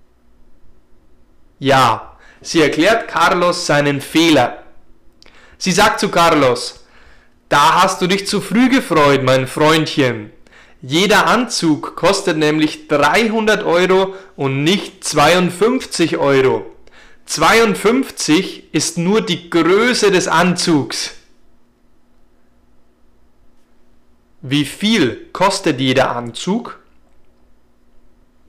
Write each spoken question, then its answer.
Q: Wie viel kostet jeder Anzug?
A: Jeder Anzug kostet 300 Euro und nicht 52 Euro.